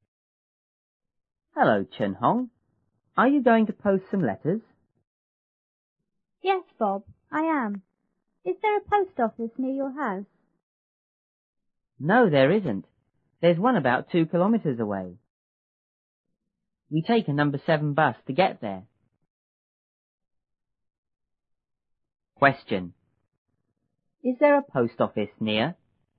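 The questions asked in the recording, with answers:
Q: Is there a post office near?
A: No, there isn't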